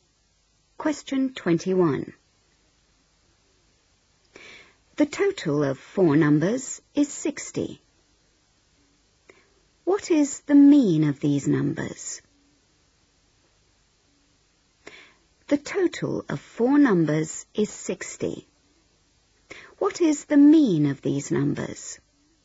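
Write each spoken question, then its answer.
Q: What is the mean of these numbers?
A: 15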